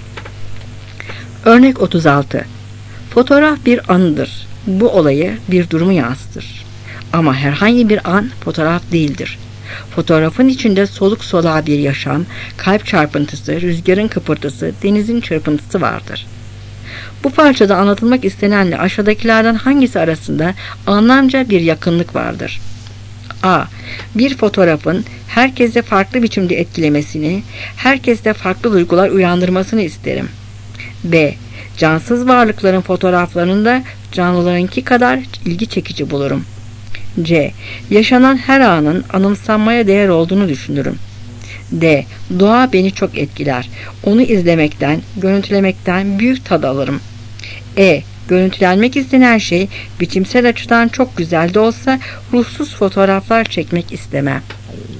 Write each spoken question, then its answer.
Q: Bu parçada anlatılmak istenenle aşağıdakilerden hangisi arasında anlamca bir yakınlık vardır?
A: Cevap E.